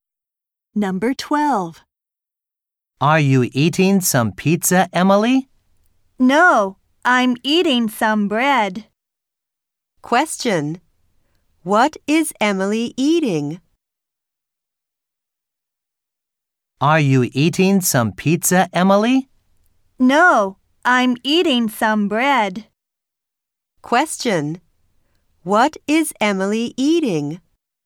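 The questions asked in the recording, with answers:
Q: What is Emily eating?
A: Some bread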